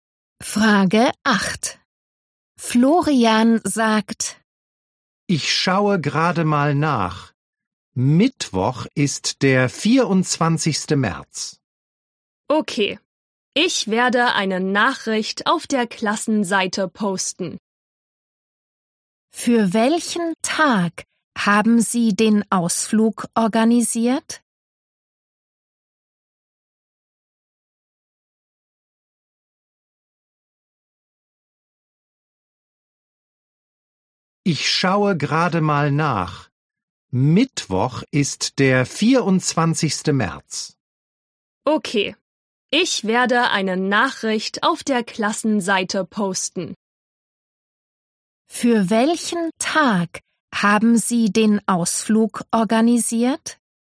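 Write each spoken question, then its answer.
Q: Für welchen Tag haben Sie den Ausflug organisiert?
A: Mittwoch, den 24. März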